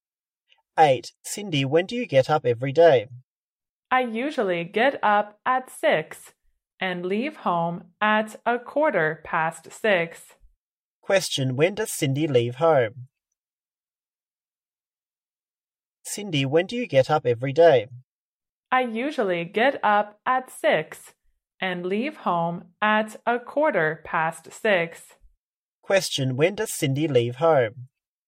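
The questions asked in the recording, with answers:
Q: when does Cindy leave home?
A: At 6:15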